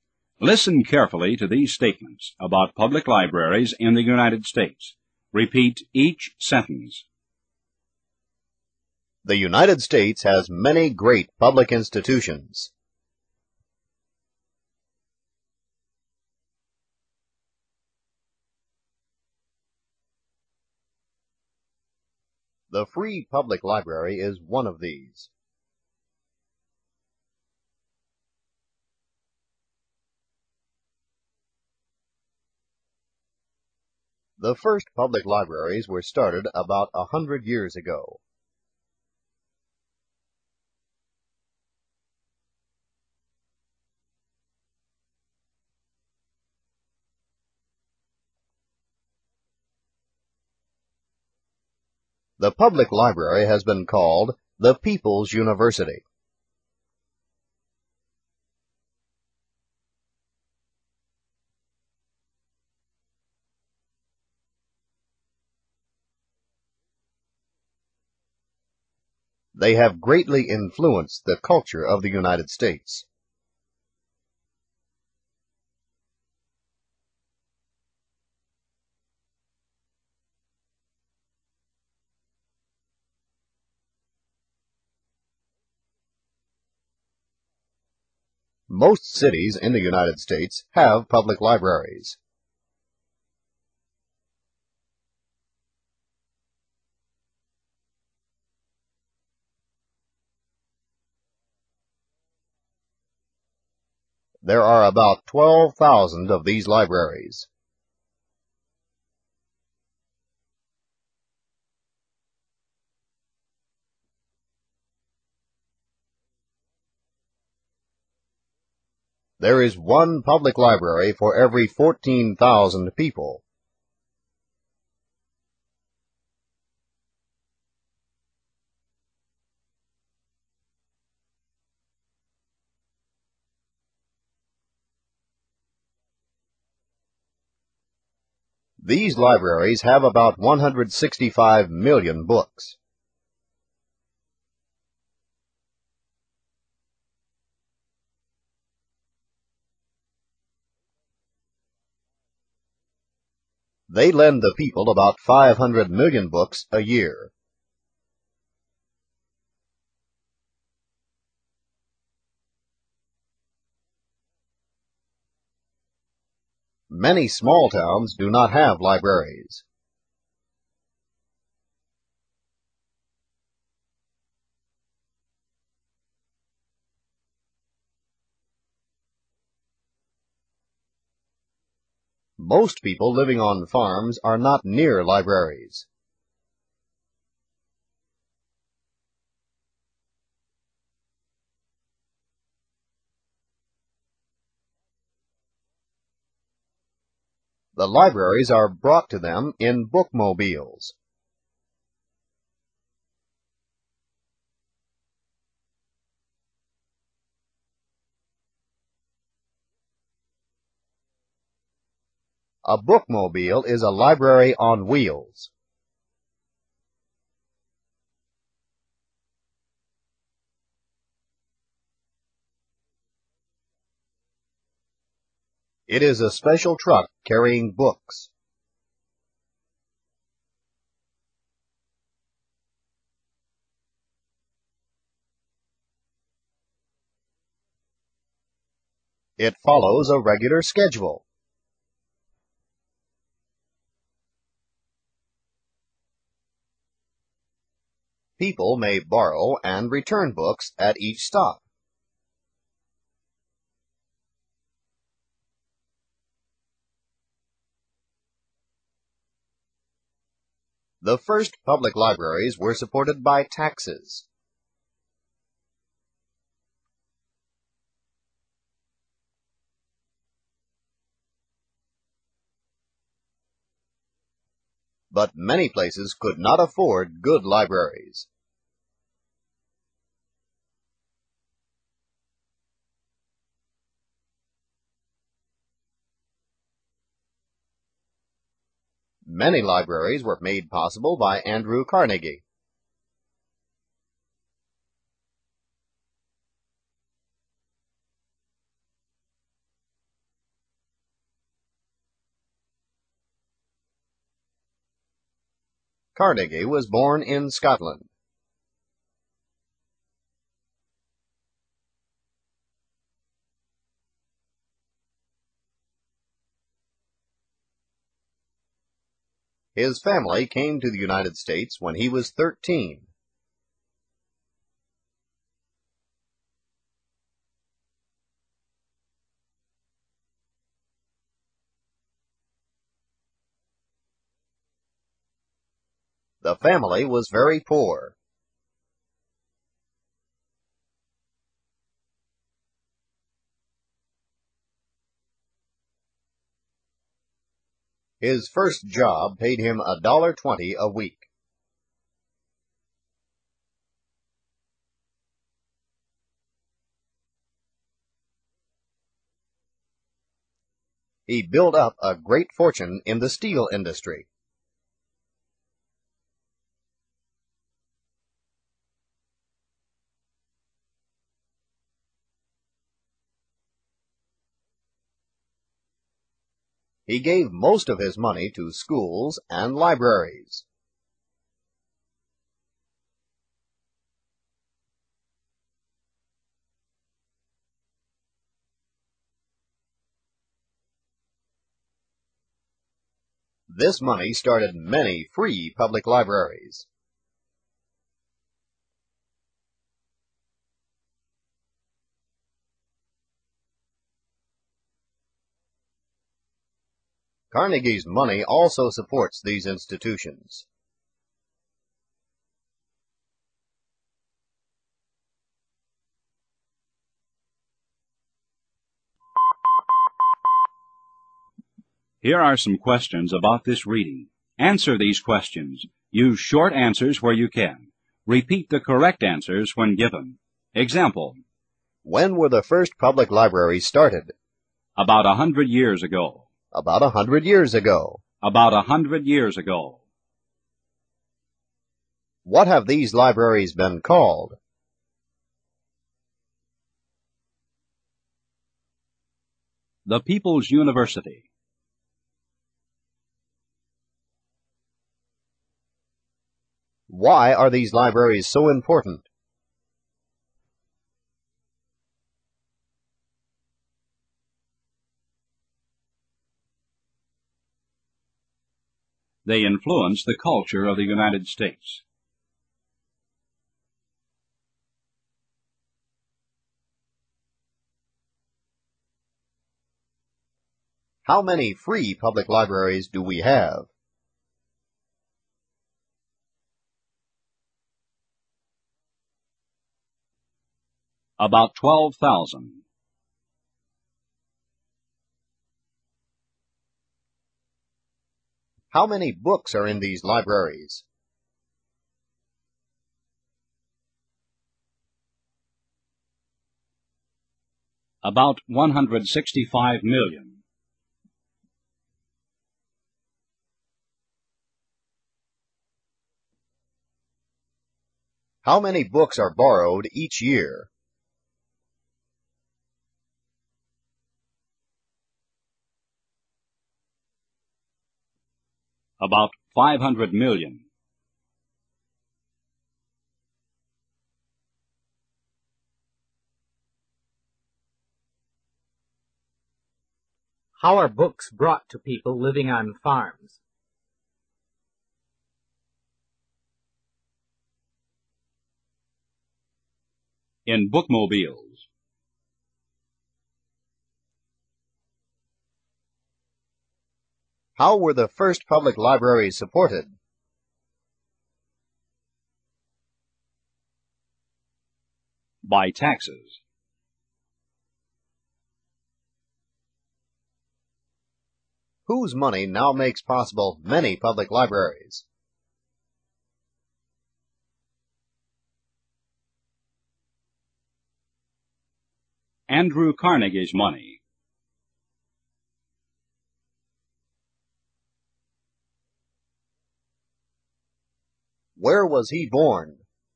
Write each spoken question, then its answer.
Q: What have these libraries been called?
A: The People's University.

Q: Why are these libraries so important?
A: They influence the culture of the United States.

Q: How many free public libraries do we have?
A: About 12,000.

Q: How many books are in these libraries?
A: About 165 million.

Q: How many books are borrowed each year?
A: About 500 million.

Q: How are books brought to people living on farms?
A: In bookmobiles.

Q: How were the first public libraries supported?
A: By taxes.

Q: Where was he born?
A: In Scotland.